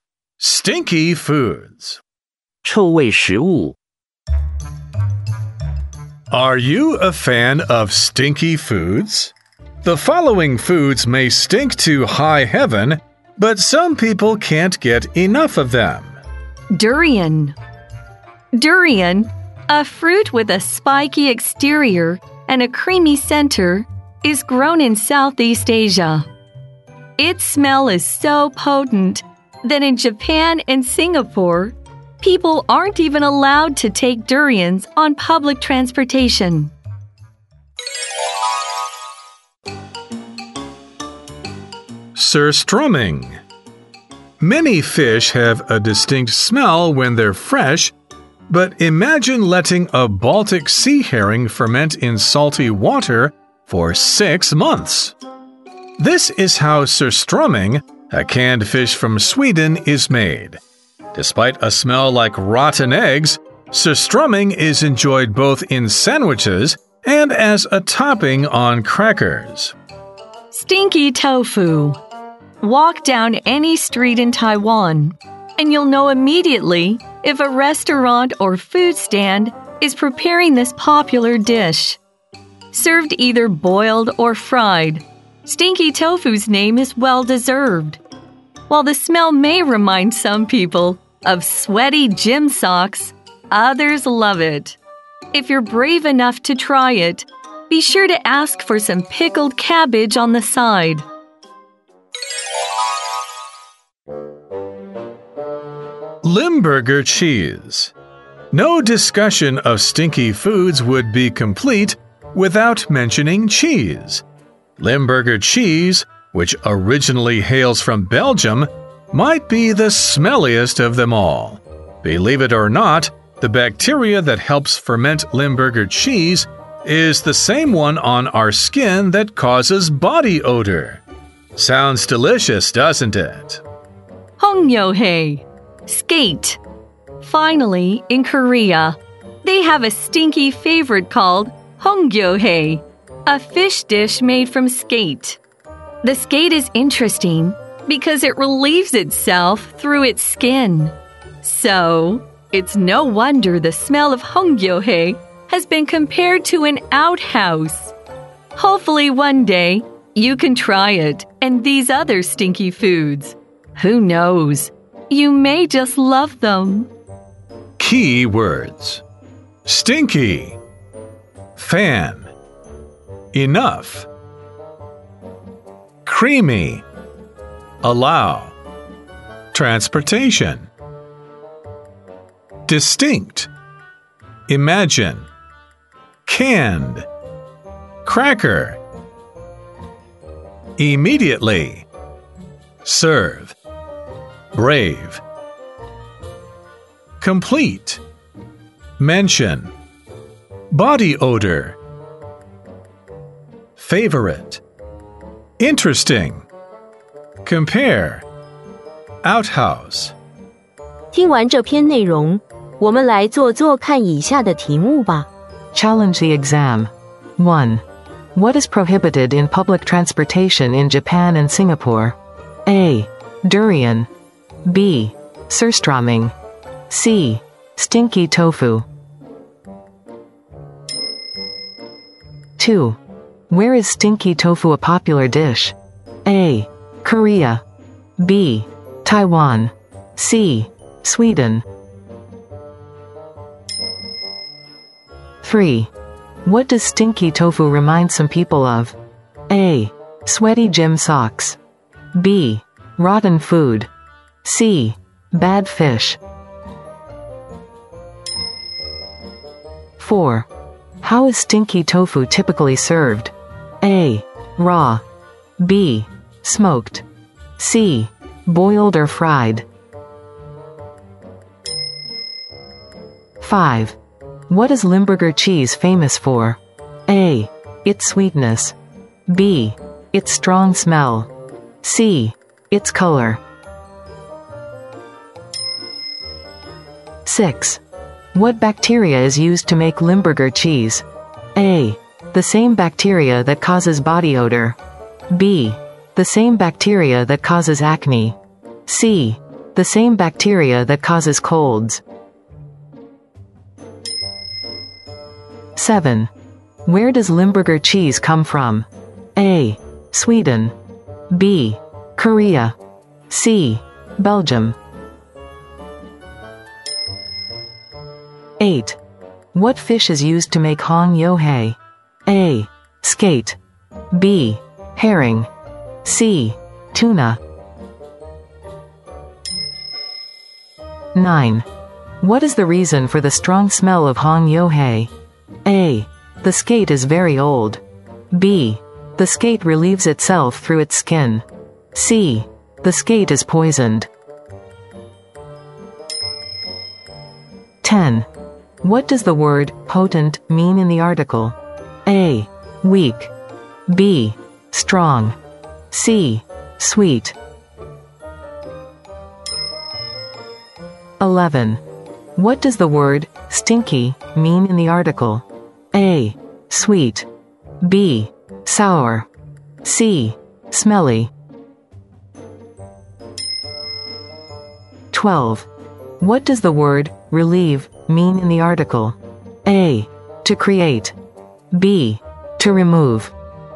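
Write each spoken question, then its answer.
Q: What is prohibited in public transportation in Japan and Singapore?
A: A: Durian

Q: Where is stinky tofu a popular dish?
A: B: Taiwan

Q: What does stinky tofu remind some people of?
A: A: Sweaty gym socks

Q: How is stinky tofu typically served?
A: C: Boiled or fried

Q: What is Limburger cheese famous for?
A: B: Its strong smell

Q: What bacteria is used to make Limburger cheese?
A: A: The same bacteria that causes body odor

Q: Where does Limburger cheese come from?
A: C: Belgium

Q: What fish is used to make hongyohei?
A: A: Skate

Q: What is the reason for the strong smell of hongyohei?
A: B: The skate relieves itself through its skin

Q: What does the word potent mean in the article?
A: B: Strong

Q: What does the word stinky mean in the article?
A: C: Smelly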